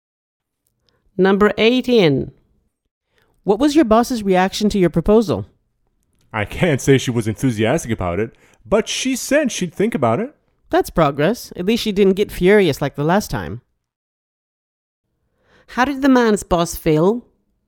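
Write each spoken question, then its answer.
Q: How did the man's boss feel?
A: Not enthusiastic, but willing to think about it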